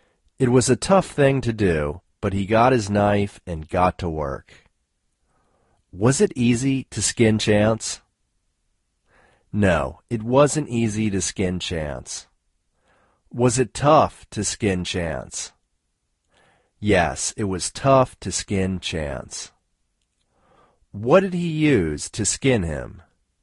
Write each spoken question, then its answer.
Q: Was it easy to skin Chance?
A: No, it wasn't easy to skin Chance.

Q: What did he use to skin him?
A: He used a knife to skin him.